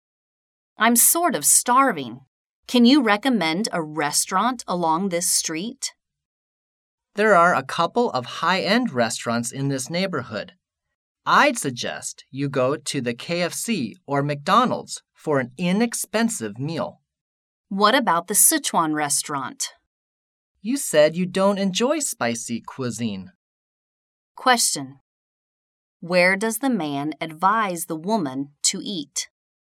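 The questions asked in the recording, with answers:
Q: Where does the man advise the woman to eat?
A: At KFC or McDonald's (a fast-food restaurant)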